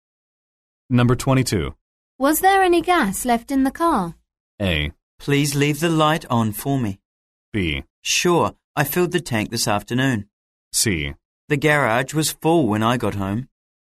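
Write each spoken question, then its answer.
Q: Was there any gas left in the car?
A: B: Sure, I filled the tank this afternoon.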